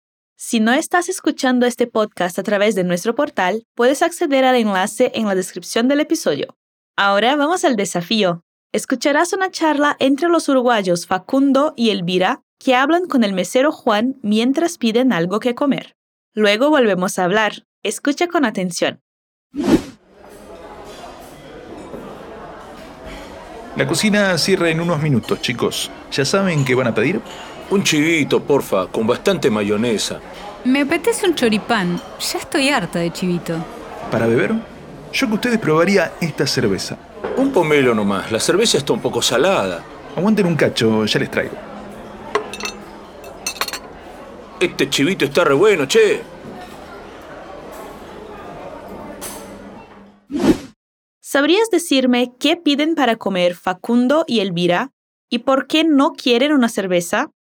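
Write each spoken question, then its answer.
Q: ¿Sabrías decirme qué piden para comer Facundo y Elvira y por qué no quieren una cerveza?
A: Facundo pide un chivito y Elvira un choripán; no quieren cerveza porque está un poco cara («salada»).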